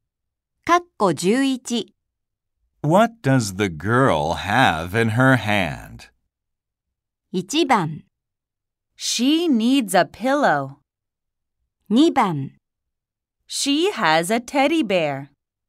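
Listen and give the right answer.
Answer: 2: She has a teddy bear.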